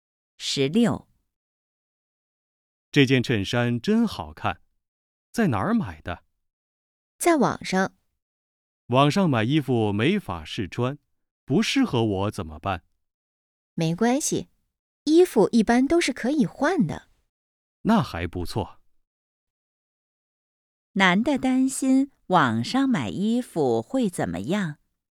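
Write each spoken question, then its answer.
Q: 男的担心网上买衣服会怎么样?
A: 没法试穿,不合适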